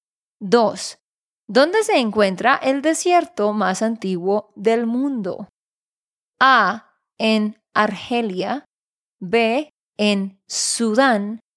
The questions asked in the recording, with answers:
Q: ¿Dónde se encuentra el desierto más antiguo del mundo?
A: La respuesta correcta es C, Namibia.